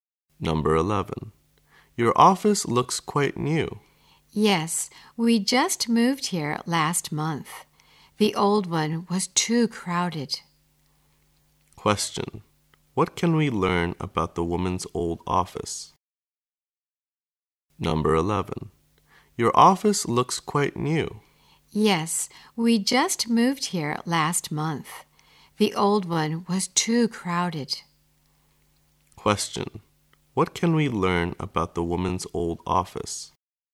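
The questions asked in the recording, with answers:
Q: what can we learn about the woman's old office?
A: It was too crowded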